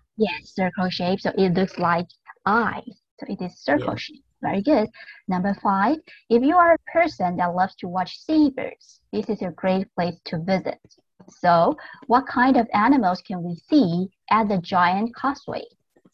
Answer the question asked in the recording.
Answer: Seabirds.